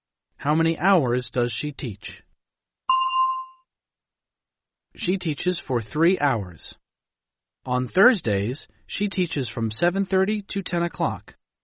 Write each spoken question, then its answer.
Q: How many hours does she teach?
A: She teaches for 2.5 hours.